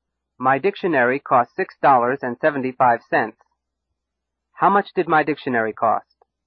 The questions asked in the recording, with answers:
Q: How much did my dictionary cost?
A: $6.75. My dictionary cost $6.75.